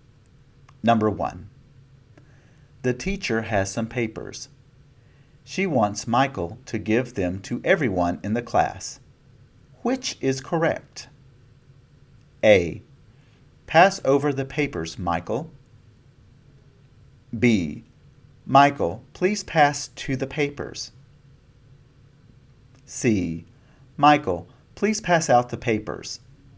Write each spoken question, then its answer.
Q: Which is correct?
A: You should have chosen C.